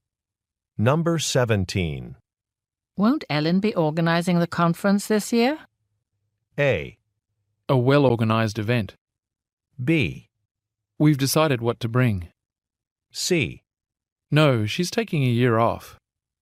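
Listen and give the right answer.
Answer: C: No, she's taking a year off.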